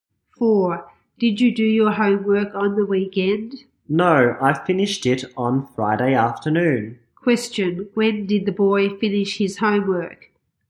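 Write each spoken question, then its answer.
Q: Question, when did the boy finish his homework?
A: On Friday afternoon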